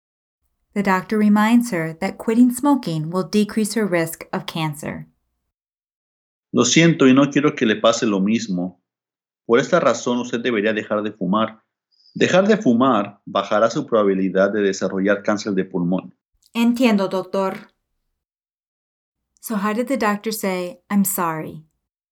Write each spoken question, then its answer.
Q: So how did the doctor say, "I'm sorry"?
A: Lo siento.